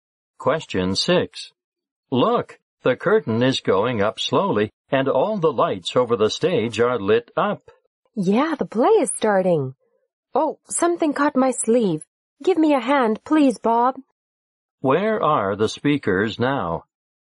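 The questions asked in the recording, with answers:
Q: Where are the speakers now?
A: In a theater.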